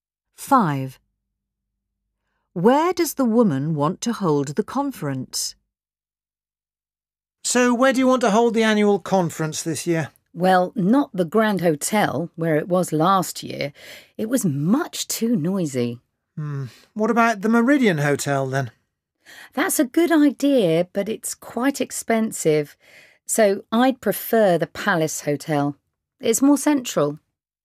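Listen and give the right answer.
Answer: the Palace Hotel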